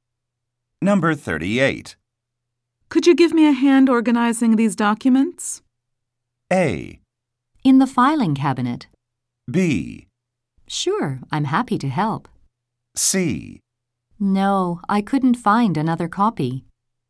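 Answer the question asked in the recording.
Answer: B: Sure, I'm happy to help.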